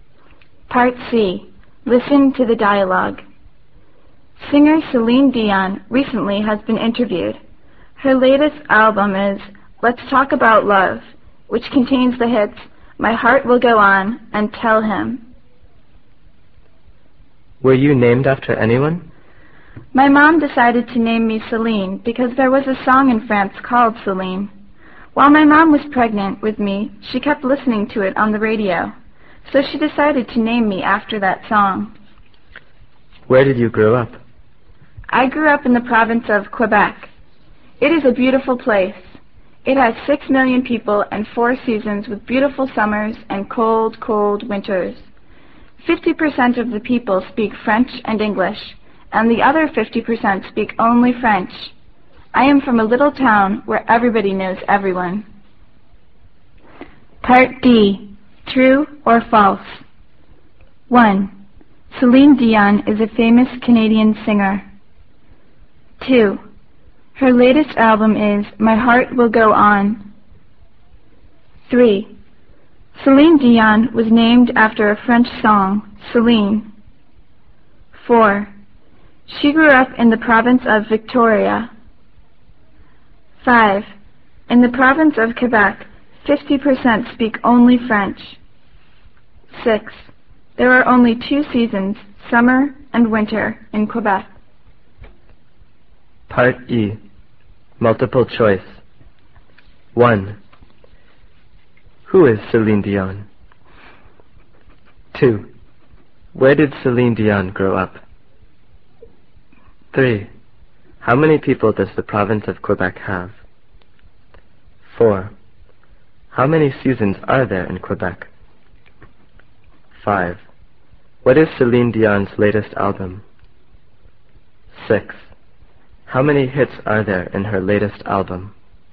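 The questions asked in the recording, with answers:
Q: She grew up in the province of Victoria.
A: False

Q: In the province of Quebec, 50% speak only French.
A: True

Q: There are only 2 seasons, summer and winter, in Quebec.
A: False

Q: How many people does the province of Quebec have?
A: 6 million

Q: How many seasons are there in Quebec?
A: Four

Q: How many hits are there in her latest album?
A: Two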